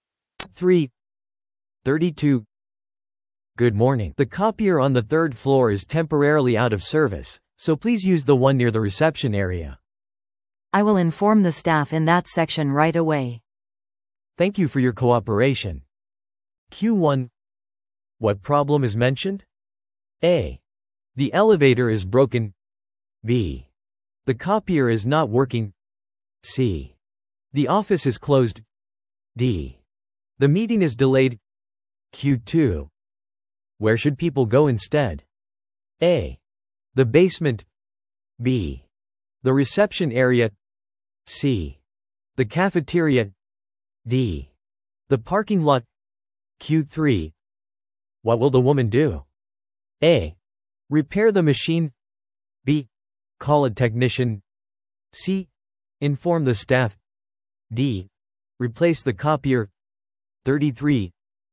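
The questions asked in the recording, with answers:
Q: What problem is mentioned?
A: B: The copier is not working.

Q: Where should people go instead?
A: B: The reception area.

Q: What will the woman do?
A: C: Inform the staff.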